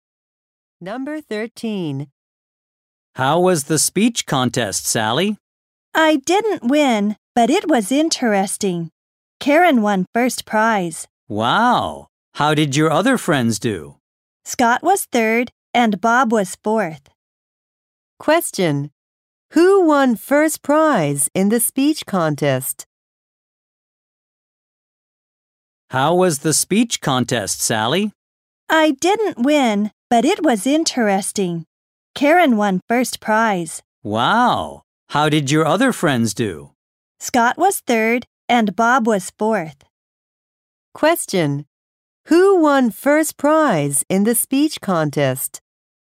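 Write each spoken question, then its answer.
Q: Who won first prize in the speech contest?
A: Karen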